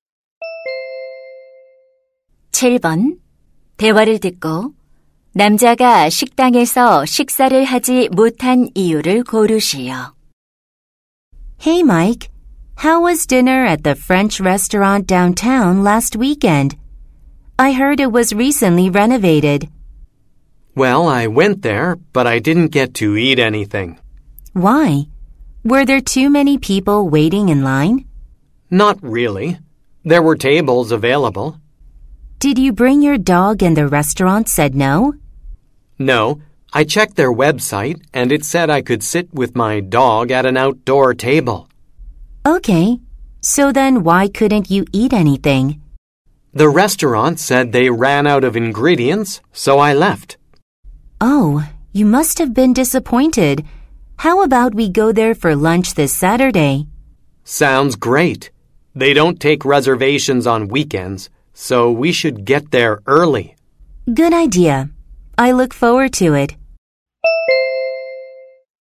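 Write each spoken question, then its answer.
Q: 대화를 듣고 남자가 식당에서 식사를 하지 못한 이유를 고르시오.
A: 식당의 재료가 다 떨어져서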